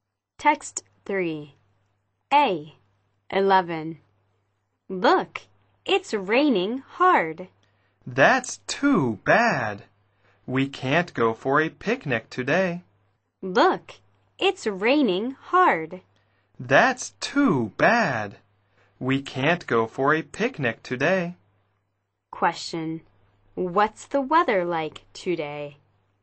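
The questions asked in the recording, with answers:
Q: What's the weather like today?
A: It's raining hard.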